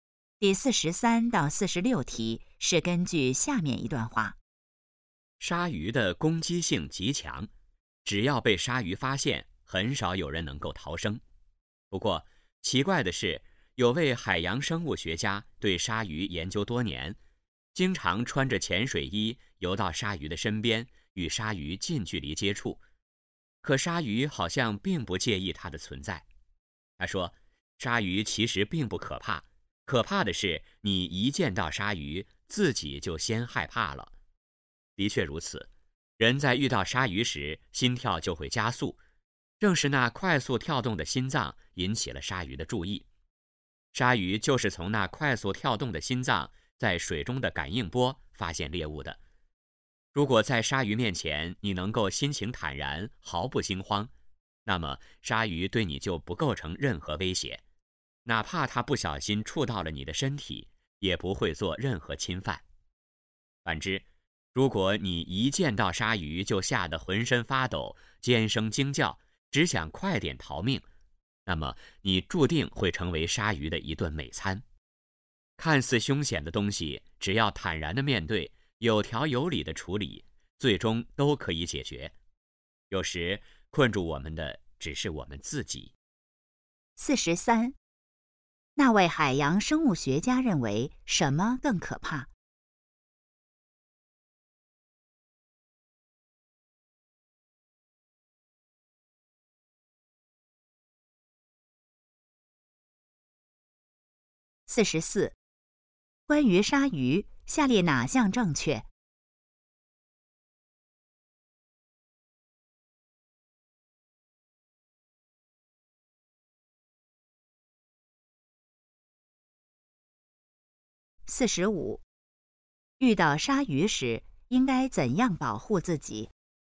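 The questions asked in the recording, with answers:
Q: 那位海洋生物学家认为什么更可怕?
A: 见到鲨鱼自己先害怕

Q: 遇到鲨鱼时应该怎样保护自己?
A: 心情坦然,毫不惊慌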